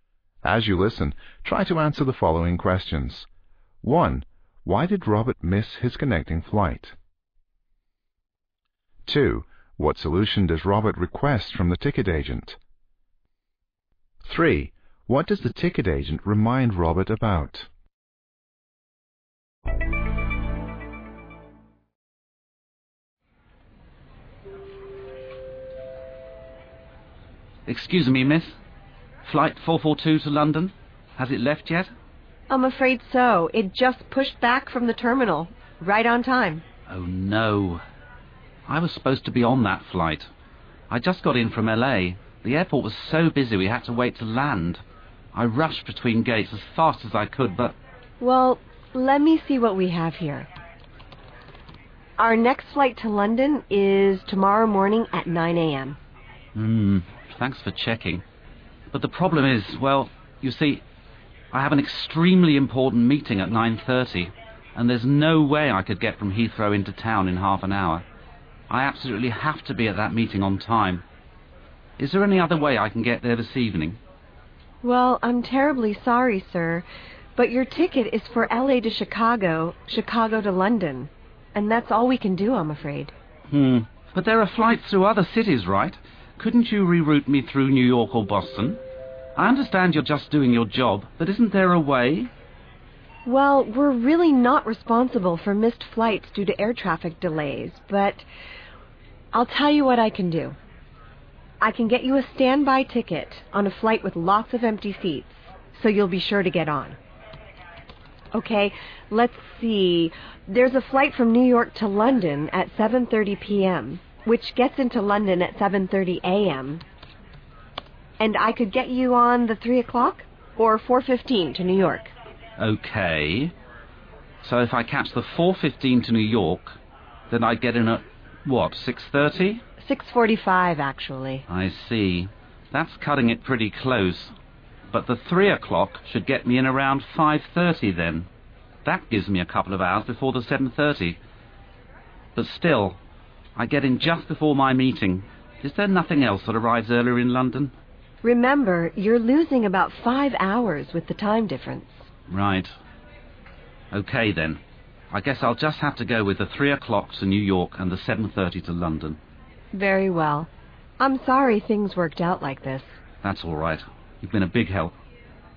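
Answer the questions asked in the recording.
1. His flight from LA was delayed landing because the Chicago airport was busy
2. To be rerouted through another city, such as New York or Boston
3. That he loses about 5 hours with the time difference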